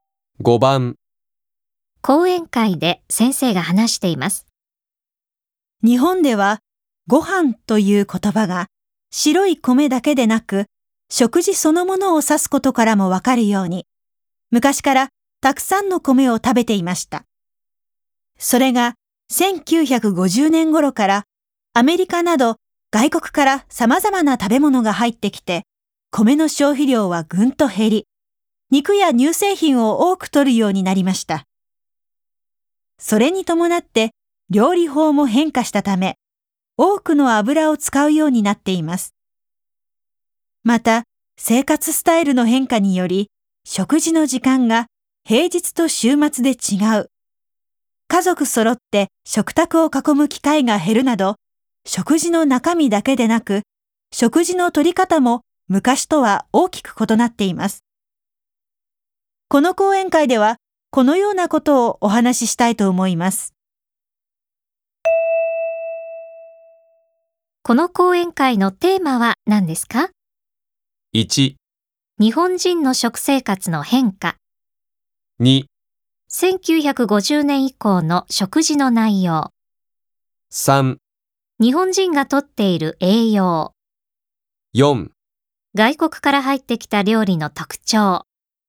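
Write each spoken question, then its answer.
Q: この講演会のテーマは何ですか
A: 1: 日本人の食生活の変化。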